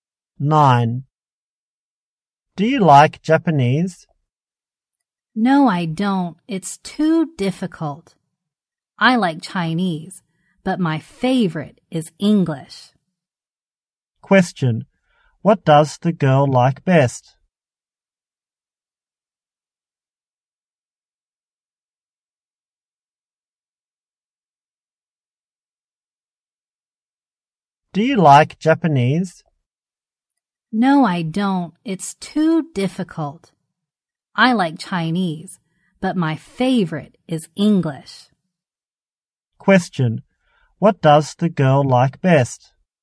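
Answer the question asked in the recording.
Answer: English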